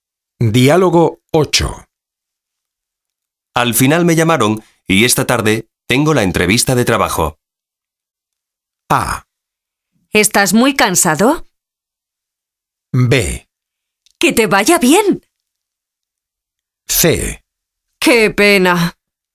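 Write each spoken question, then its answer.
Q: Al final me llamaron y esta tarde tengo la entrevista de trabajo.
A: B: ¡Que te vaya bien!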